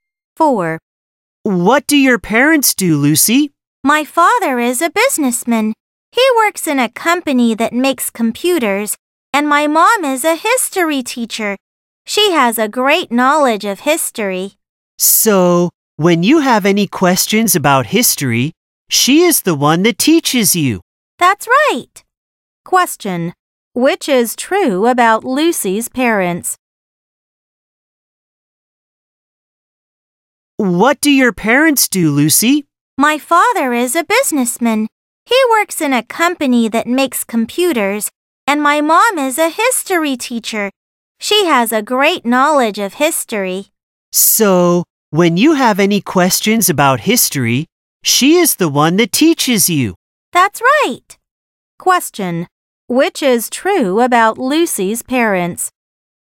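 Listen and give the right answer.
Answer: Her father is a businessman at a computer company and her mother is a history teacher.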